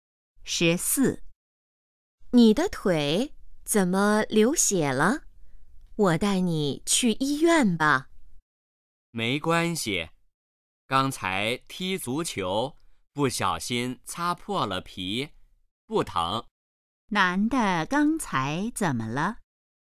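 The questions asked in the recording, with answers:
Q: 男的刚才怎么了?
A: 踢足球擦破了皮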